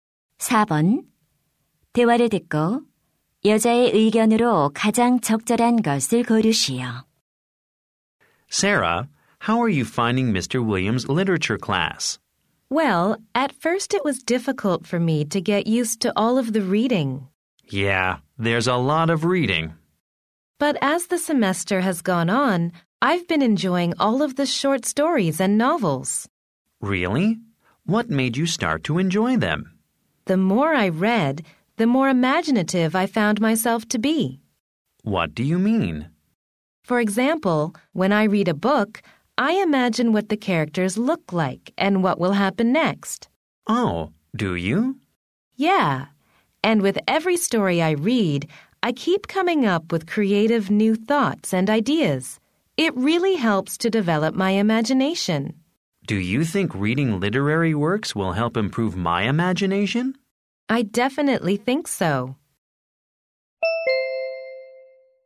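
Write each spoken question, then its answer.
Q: 대화를 듣고 여자의 의견으로 가장 적절한 것을 고르시오.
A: 문학 작품을 읽는 것은 상상력을 키우는 데 도움이 된다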